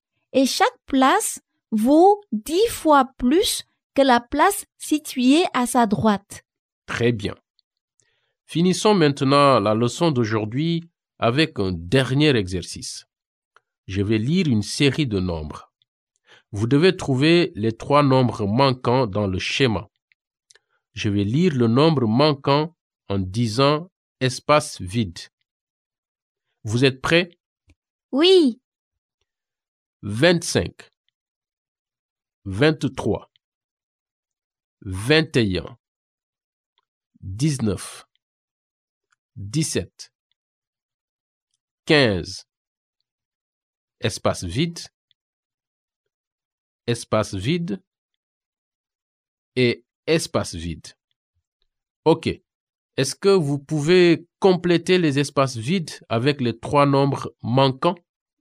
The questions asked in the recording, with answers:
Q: OK. Est-ce que vous pouvez compléter les espaces vides avec les trois nombres manquants?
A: 13, 11 et 9.